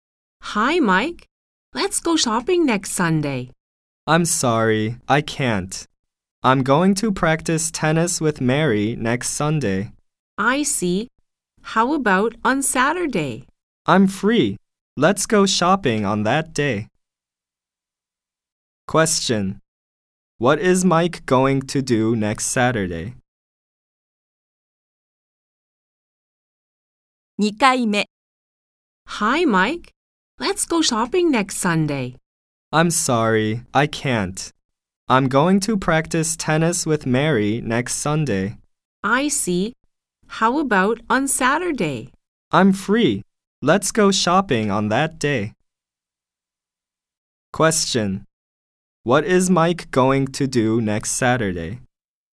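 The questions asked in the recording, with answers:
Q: What is Mike going to do next Saturday?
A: Go shopping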